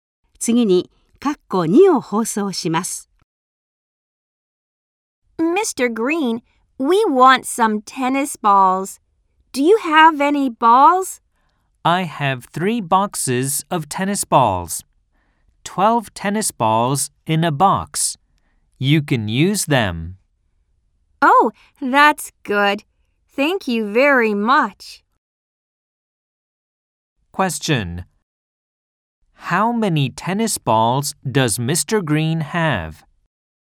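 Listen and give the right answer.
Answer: 36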